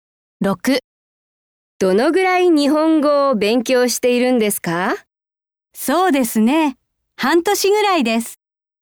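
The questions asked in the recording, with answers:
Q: どのぐらい日本語を勉強しているんですか?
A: 半年ぐらい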